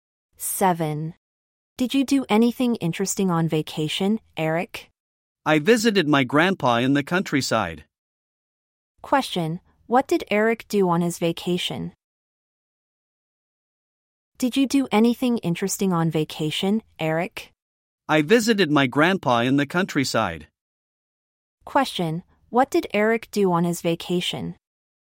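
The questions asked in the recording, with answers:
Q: Question, what did Eric do on his vacation?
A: He visited his grandpa in the countryside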